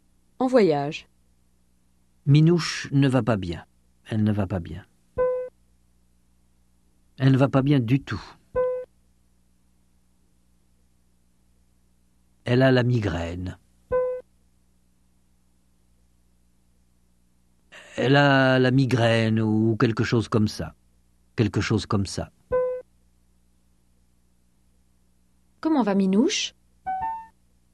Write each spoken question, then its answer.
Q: Comment va Minouche ?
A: Elle ne va pas bien du tout.